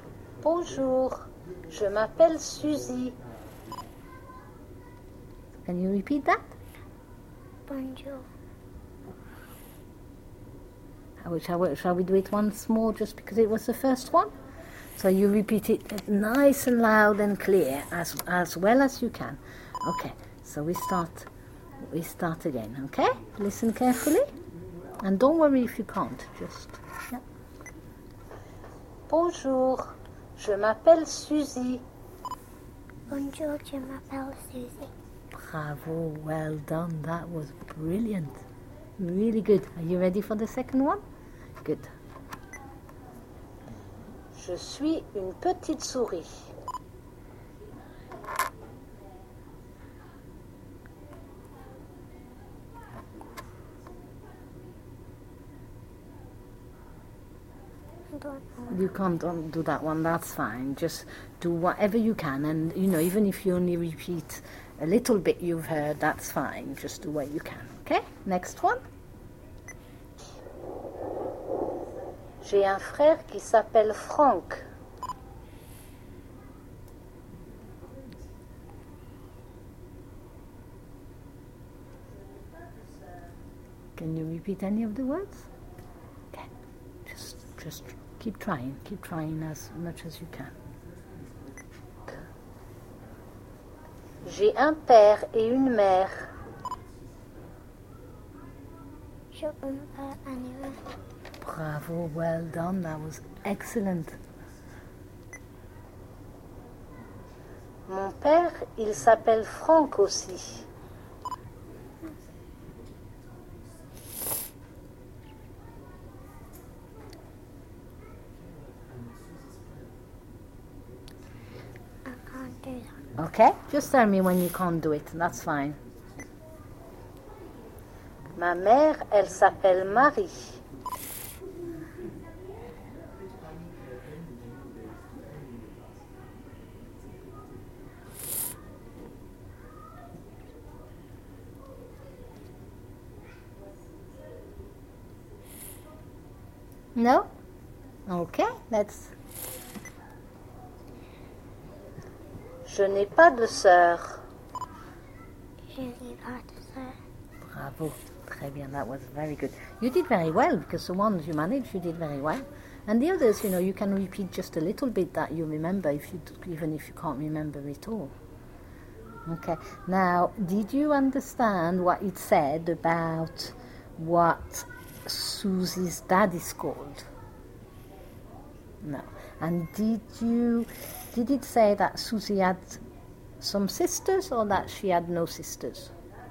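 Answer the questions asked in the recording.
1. Franck
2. She had no sisters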